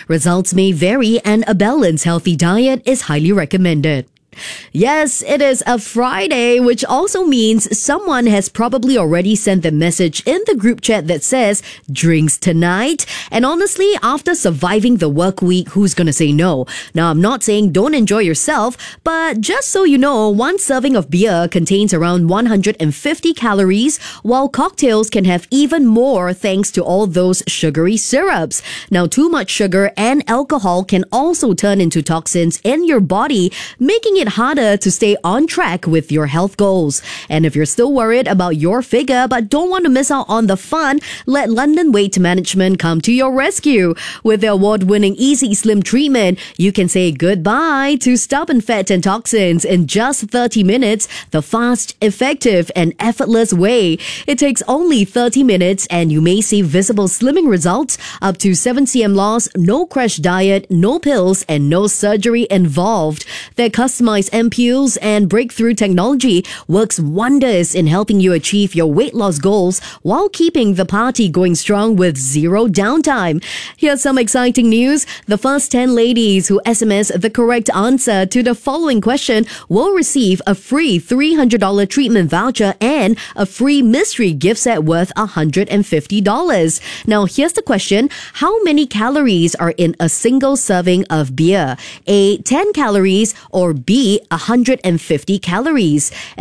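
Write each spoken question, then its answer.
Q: How many calories are in a single serving of beer?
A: B: 150 calories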